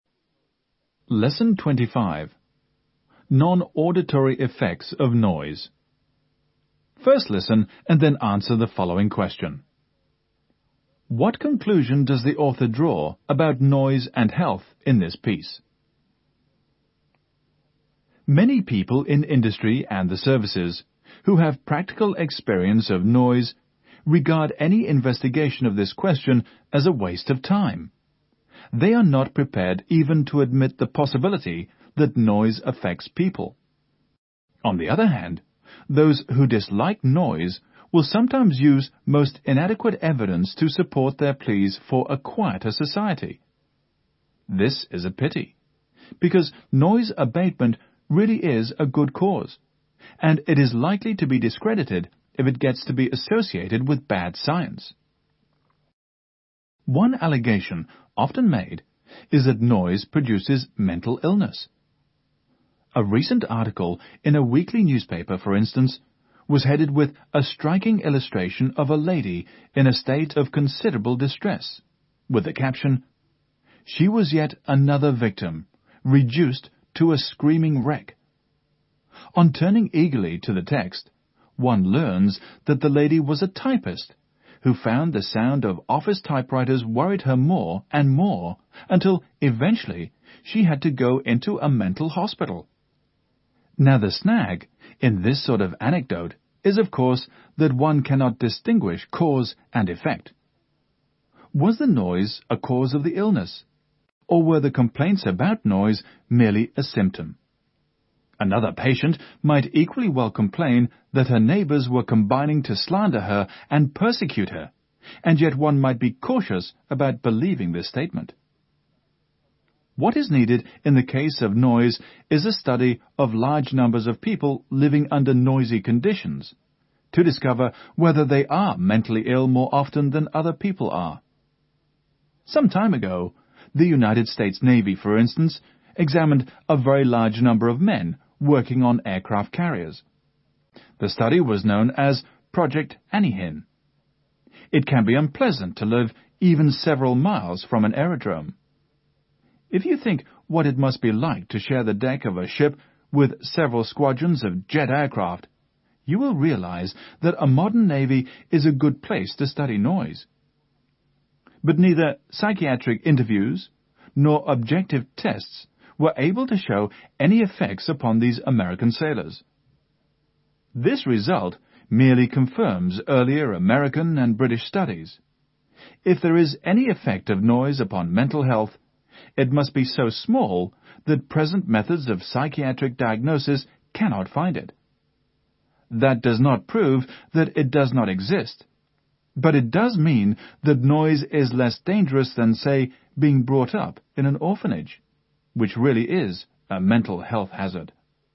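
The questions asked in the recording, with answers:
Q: What conclusion does the author draw about noise and health in this piece?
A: Any effect of noise on mental health is too small for present psychiatric methods to detect; it is not proven harmful.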